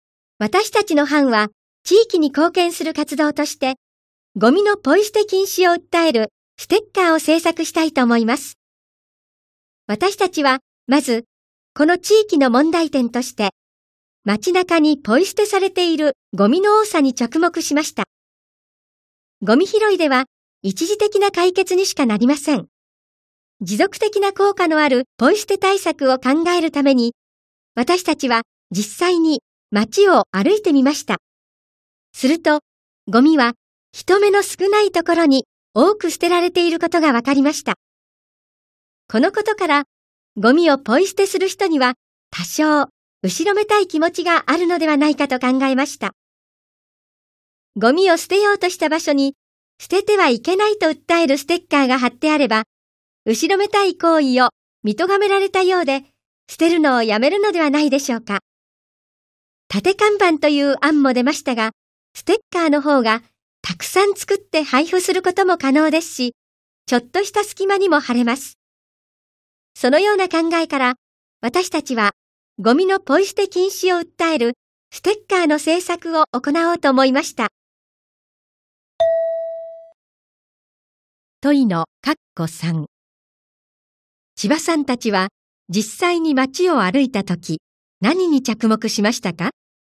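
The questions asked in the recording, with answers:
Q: 千葉さんたちは、実際に街を歩いたとき、何に着目しましたか?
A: ゴミが人目の少ないところに多く捨てられていること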